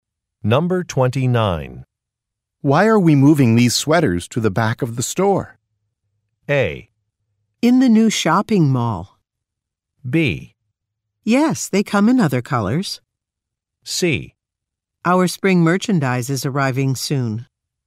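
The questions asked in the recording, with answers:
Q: Why are we moving these sweaters to the back of the store?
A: C: Our spring merchandise is arriving soon.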